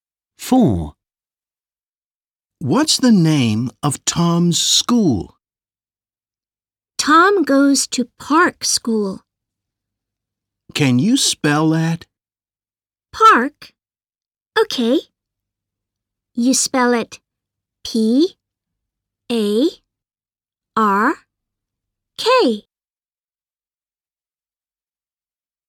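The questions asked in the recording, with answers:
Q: What's the name of Tom's school?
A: Park School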